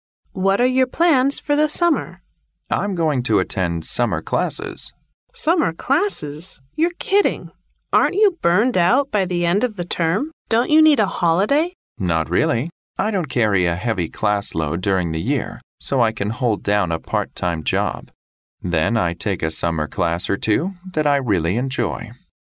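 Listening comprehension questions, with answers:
What is the man going to do during the summer?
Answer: Attend classes.

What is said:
W: What are your plans for the summer?
M: I'm going to attend summer classes.
W: Summer classes? You're kidding. Aren't you burned out by the end of the term? Don't you need a holiday?
M: Not really. I don't carry a heavy class load during the year so I can hold down a part-time job. Then I take a summer class or two that I really enjoy.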